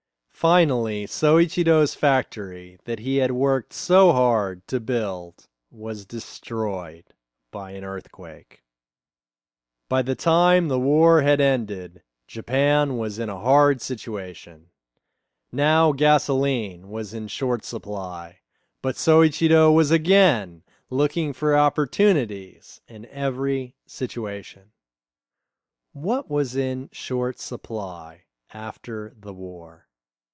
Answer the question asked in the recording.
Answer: Gasoline was in short supply after the war.